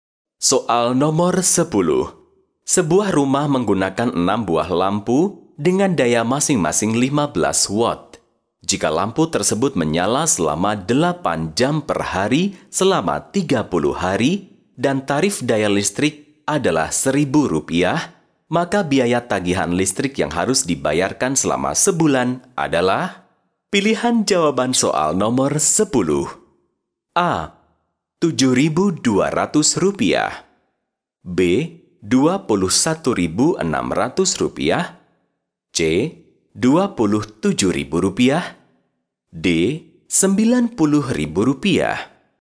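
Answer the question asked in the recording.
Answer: B: Rp21.600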